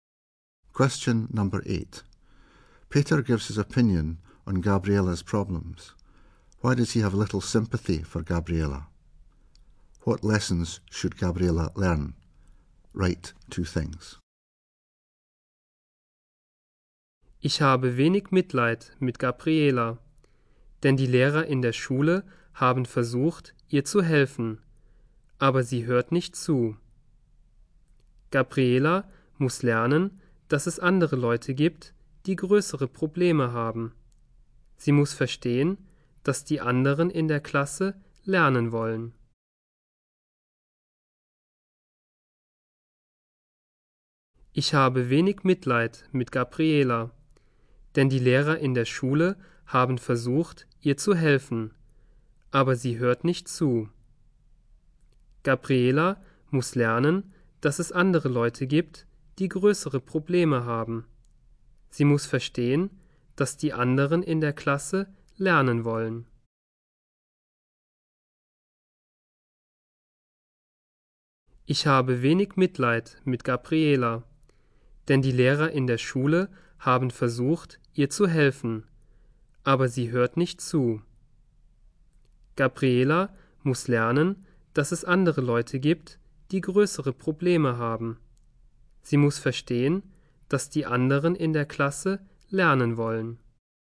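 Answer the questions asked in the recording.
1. Teachers tried to help her but she doesn't listen
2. Other people have bigger problems; others in the class want to learn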